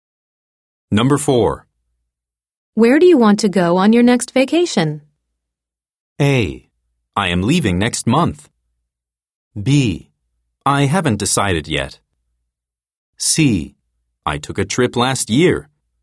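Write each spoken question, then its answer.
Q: Where do you want to go on your next vacation?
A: B: I haven't decided yet.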